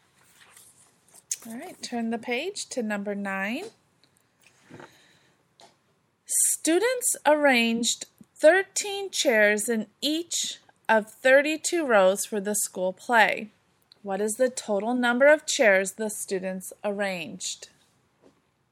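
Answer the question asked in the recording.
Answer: 416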